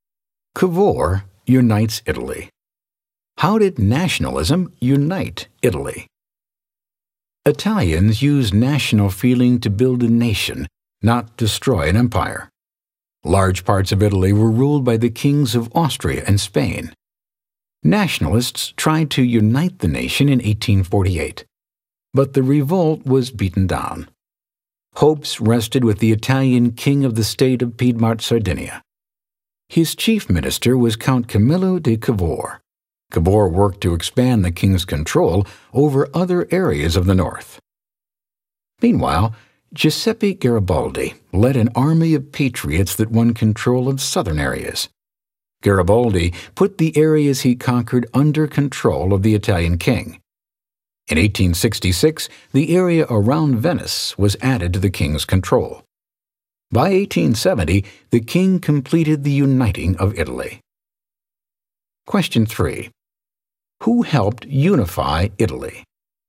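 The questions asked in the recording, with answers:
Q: Who helped unify Italy?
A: Cavour and Garibaldi (with the king of Piedmont-Sardinia)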